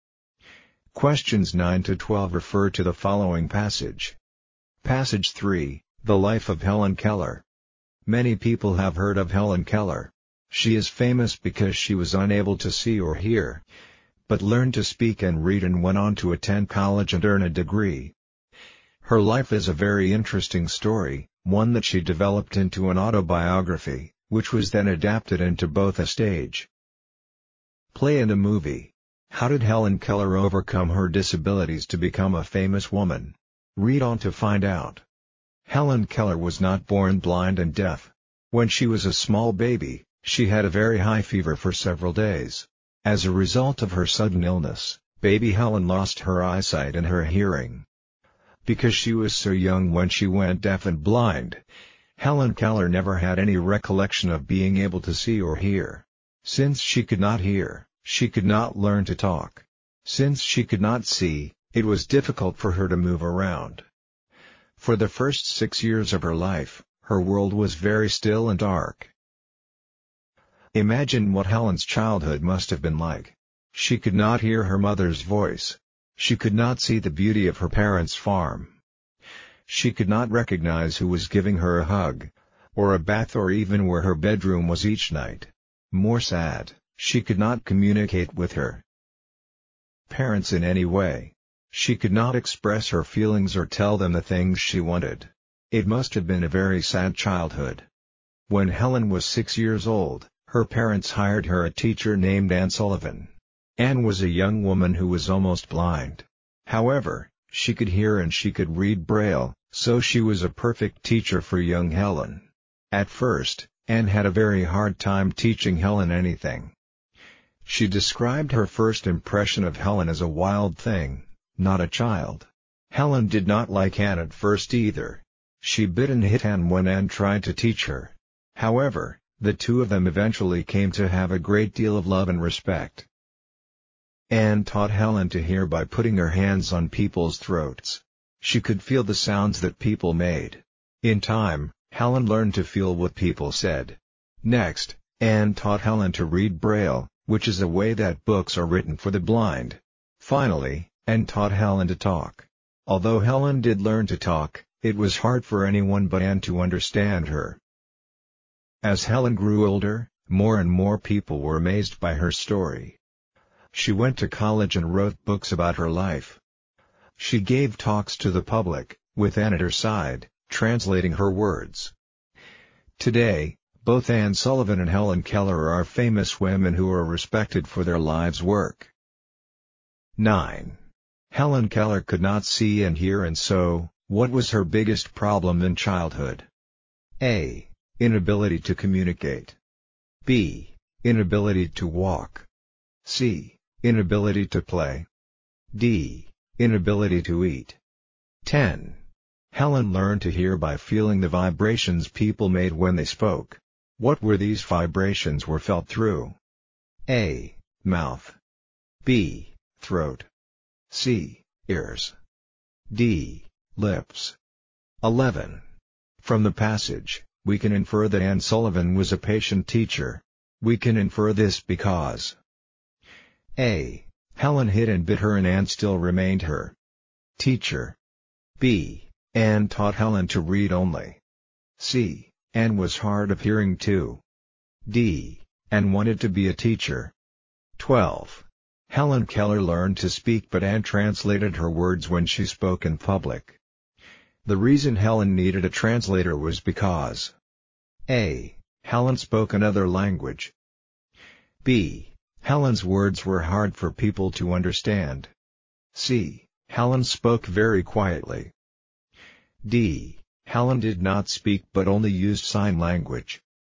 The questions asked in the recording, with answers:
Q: Helen Keller could not see and hear, and so, what was her biggest problem in childhood?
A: 9. A. Helen's parents hired Anne to teach Helen to communicate.

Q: What were these vibrations were felt through?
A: 10. B. The correct answer because the fact is stated directly in the passage.

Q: From the passage, we can infer that Anne Sullivan was a patient teacher.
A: 11. A. We can infer that Anne is a patient teacher because she did not leave or lose her temper when Helen bit or hit her, she just kept trying to teach Helen.

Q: The reason Helen needed a translator was because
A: 12. B. The passage states that it was hard for anyone but Anne to understand Helen when she spoke.